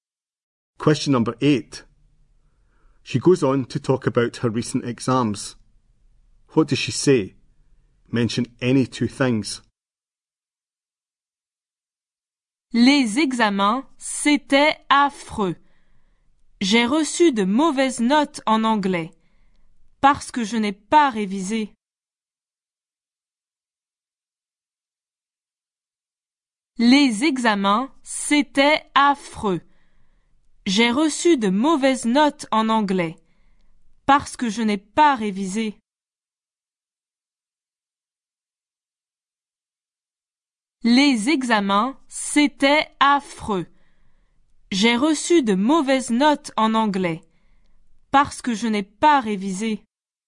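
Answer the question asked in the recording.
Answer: The exams were awful; she got bad marks in English; she didn't revise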